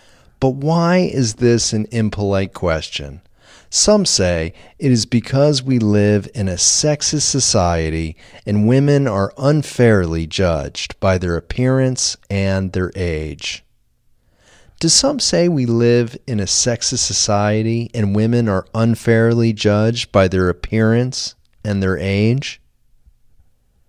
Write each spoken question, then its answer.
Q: Do some say we live in a sexist society and women are unfairly judged by their appearance and their age?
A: Yes, some say we live in a sexist society and women are unfairly judged by their appearance and their age.